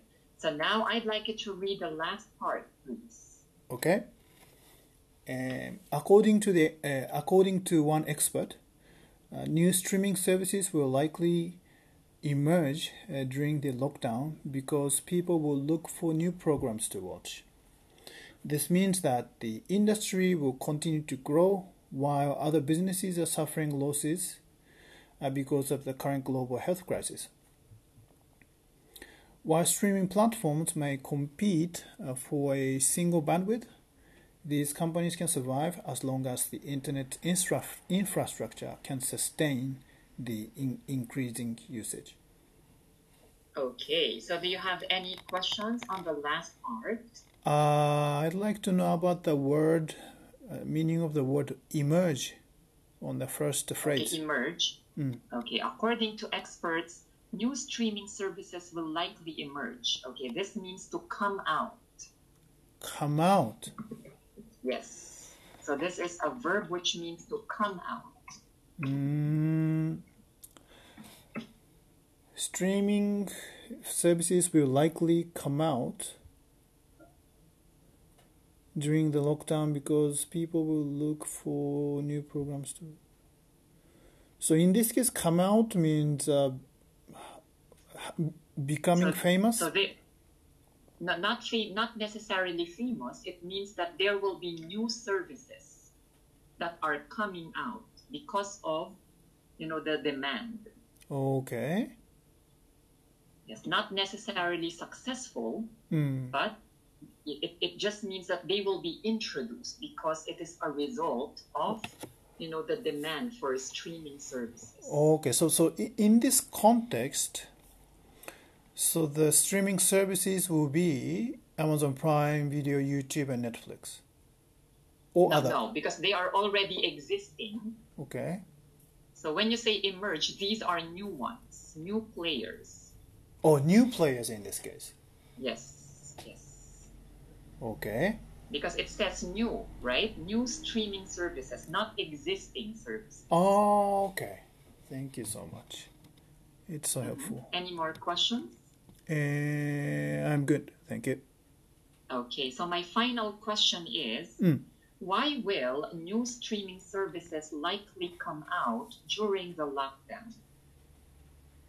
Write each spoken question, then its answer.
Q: why will new streaming services likely come out during the lockdown?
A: Mm, because people will look for new programs to watch.